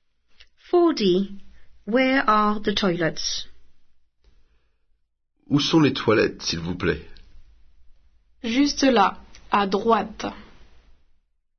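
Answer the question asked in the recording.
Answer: just there, on the right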